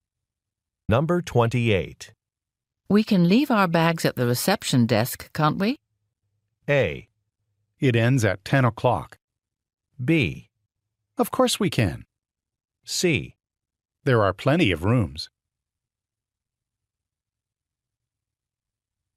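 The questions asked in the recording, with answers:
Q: We can leave our bags at the reception desk, can't we?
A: B: Of course we can.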